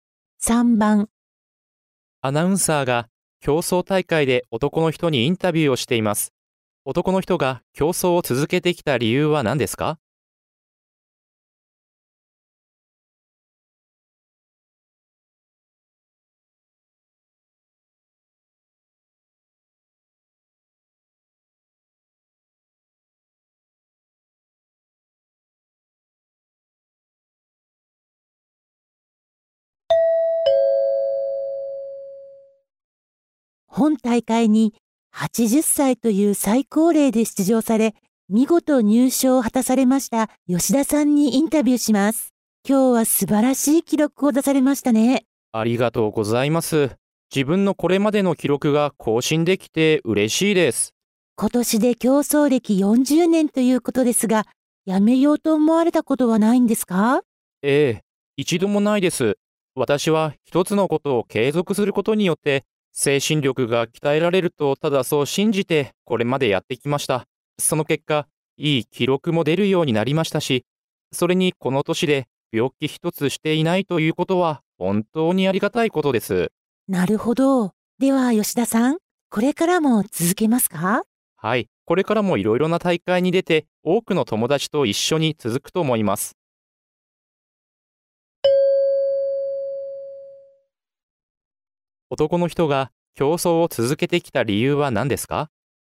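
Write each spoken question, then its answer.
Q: 男の人が競争を続けてきた理由は何ですか?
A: 一つのことを続けることで精神力が鍛えられると信じているから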